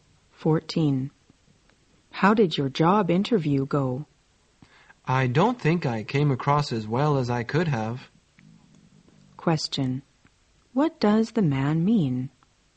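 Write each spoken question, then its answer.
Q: What does the man mean?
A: He thinks his interview didn't go well.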